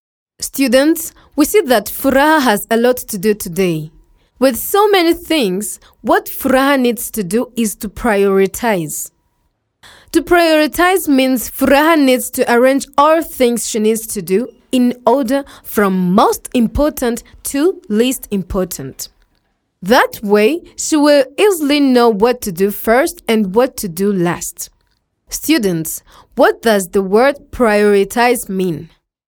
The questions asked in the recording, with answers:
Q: Students, what does the word prioritize mean?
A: to prioritize means to list things from most important to least important.